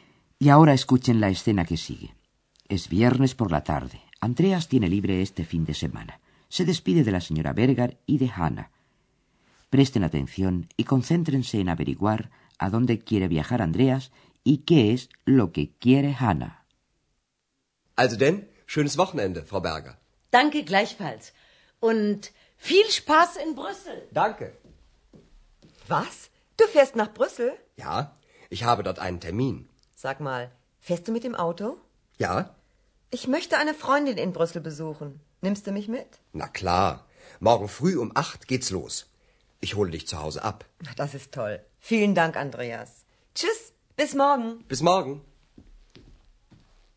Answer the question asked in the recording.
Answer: Andreas va a marcharse con su auto a pasar el fin de semana en Bruselas. Y Hanna quiere visitar a una amiga suya que vive allí.